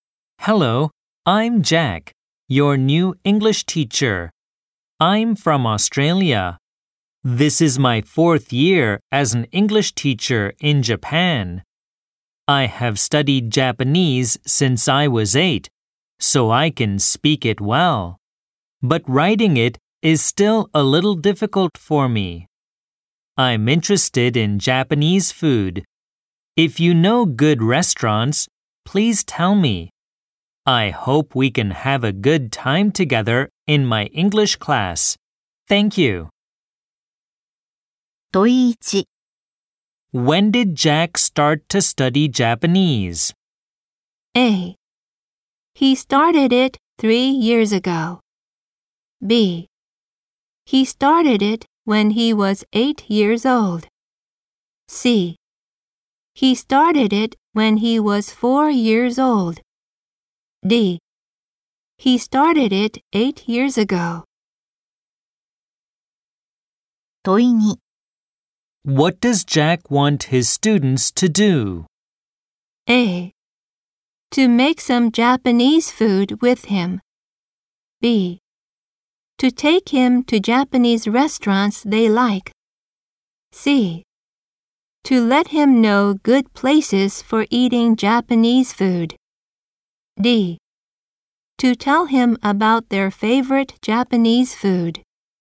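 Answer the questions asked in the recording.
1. B: He started it when he was eight years old.
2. C: To let him know good places for eating Japanese food.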